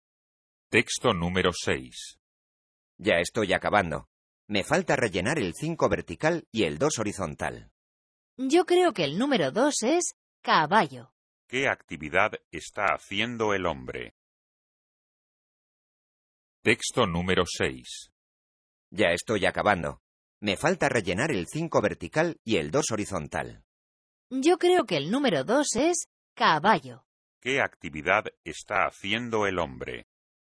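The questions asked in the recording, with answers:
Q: ¿Qué actividad está haciendo el hombre?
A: Un crucigrama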